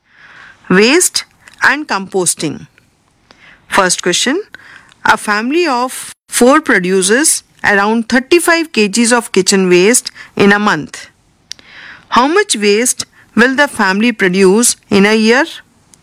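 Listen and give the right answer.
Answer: 420 kg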